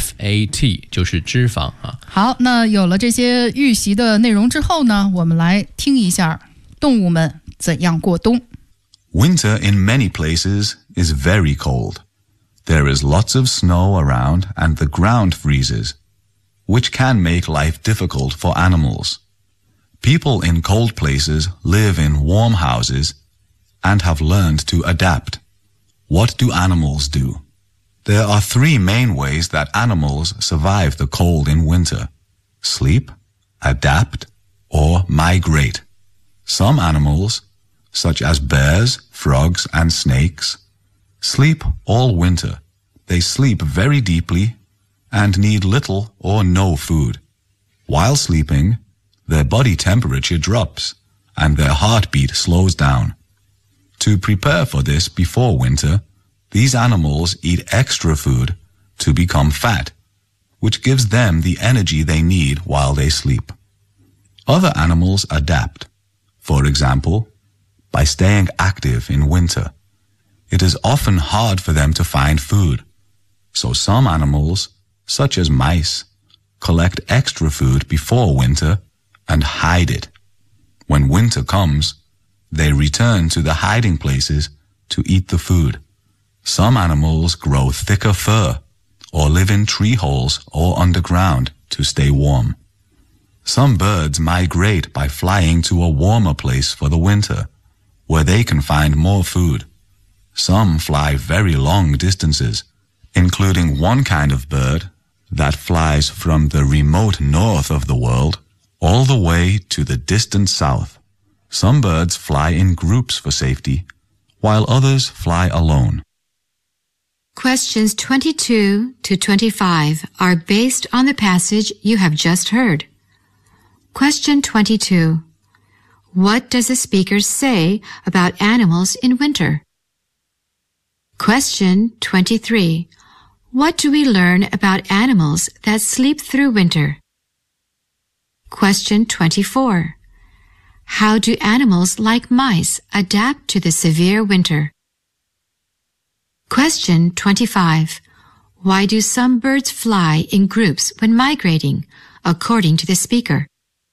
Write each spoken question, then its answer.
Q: What does the speaker say about animals in winter?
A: The animals adapt in different ways, in order to avoid the coldness in winter.

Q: What do we learn about animals that sleep through winter?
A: they seldom eat any food at all.

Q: How do animals like mice adapt to the severe winter?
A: Animals like mice may collect extra food and hide the food so that in winter time they return to the place and eat the food there.

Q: Why do some birds fly in groups when migrating, according to the speaker?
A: That is for safety reasons that some animals may migrate in groups.